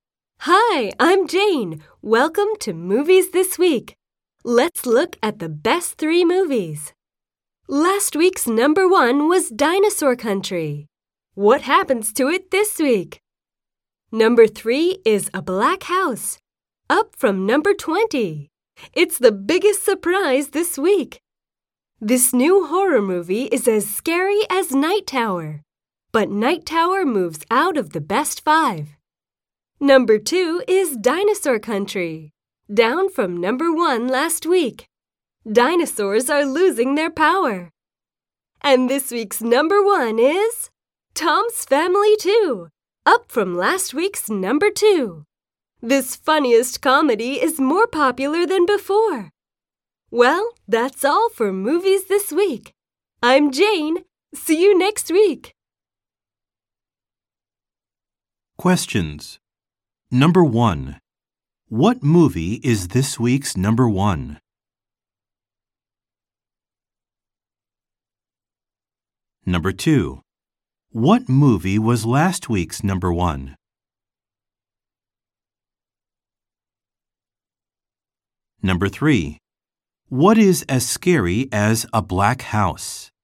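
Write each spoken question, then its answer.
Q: What movie is this week's number one?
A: Tom's Family 2

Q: What movie was last week's number one?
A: Dinosaur Country

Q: What is as scary as a black house?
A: Night Tower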